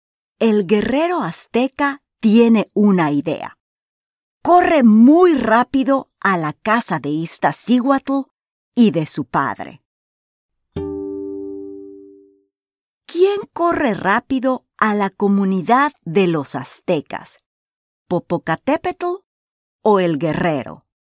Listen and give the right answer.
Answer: Sí, el guerrero.